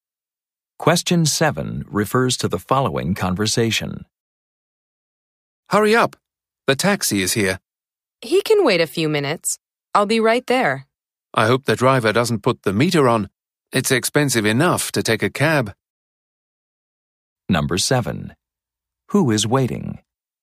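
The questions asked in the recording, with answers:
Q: Who is waiting?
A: The taxi driver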